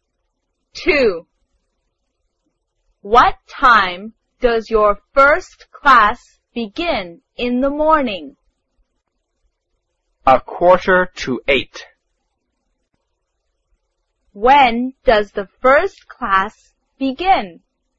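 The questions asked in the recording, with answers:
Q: When does the first class begin?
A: At a quarter to eight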